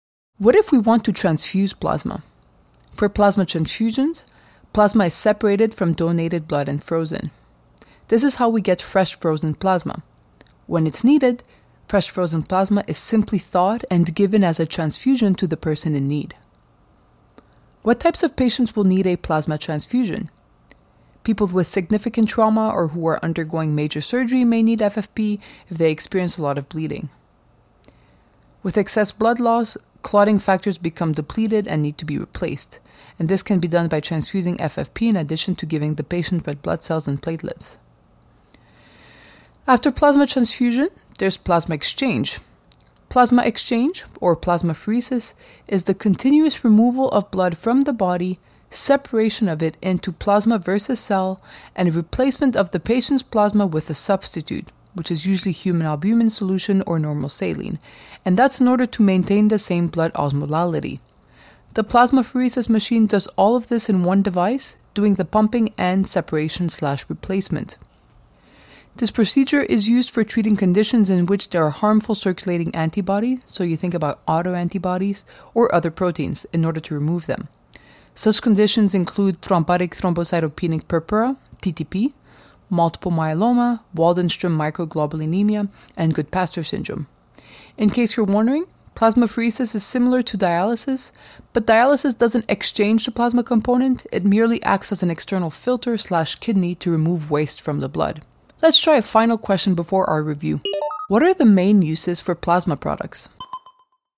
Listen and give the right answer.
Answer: The main uses for plasma products are plasma transfusion and plasma exchange.